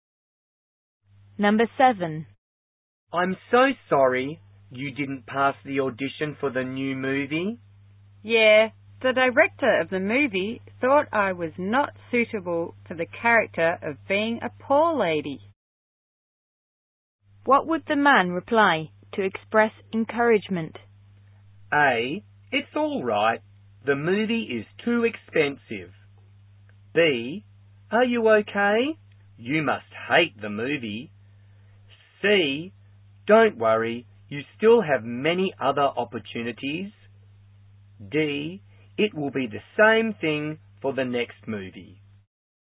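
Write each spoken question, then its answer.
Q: What would the man reply to express encouragement?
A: C: Don't worry. You still have many other opportunities.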